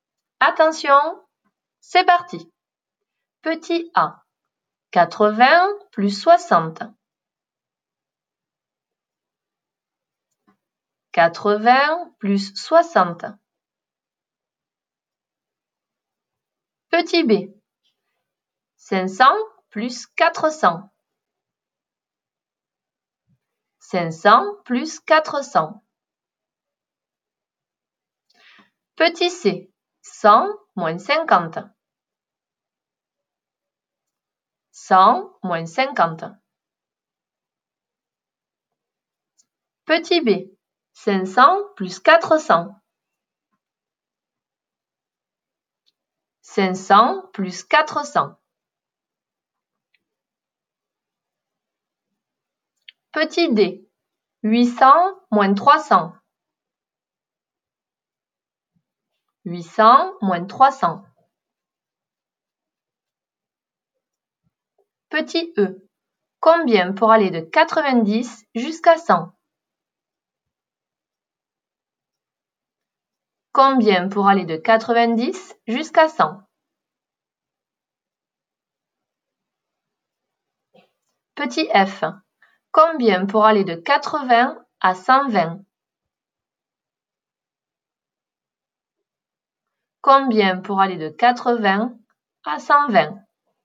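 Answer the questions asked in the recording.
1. 140
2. 900
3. 50
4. 500
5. 10
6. 40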